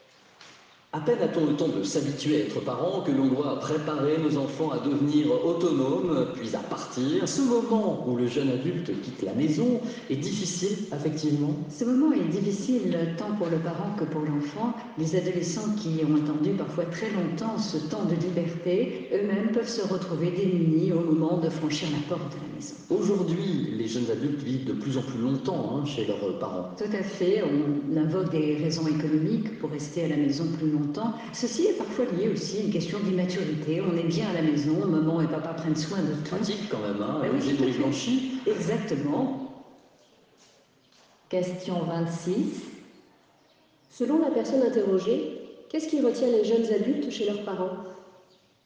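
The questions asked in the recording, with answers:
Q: Selon la personne interrogée, qu'est-ce qui retient les jeunes adultes chez leurs parents ?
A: Des raisons économiques, et parfois l'immaturité : à la maison, les parents s'occupent de tout.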